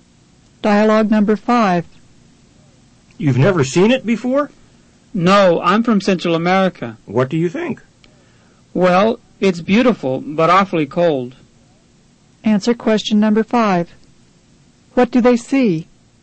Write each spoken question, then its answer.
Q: What do they see?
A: Number 5 is C.